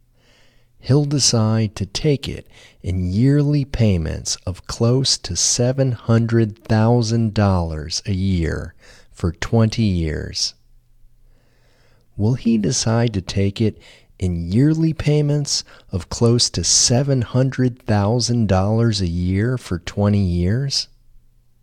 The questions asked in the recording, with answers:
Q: Will he decide to take it in yearly payments of close to $700,000 a year for 20 years?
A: Yes, he will decide to take it in yearly payments of close to $700,000 a year for 20 years.